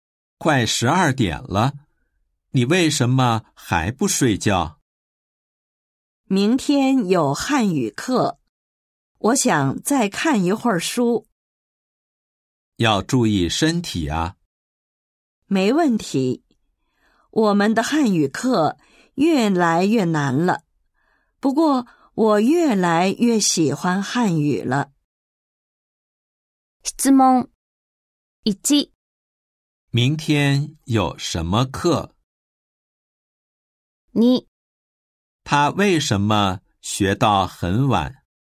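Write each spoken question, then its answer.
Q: 明天有什么课?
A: 汉语课

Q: 他为什么学到很晚?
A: 明天有汉语课,课越来越难了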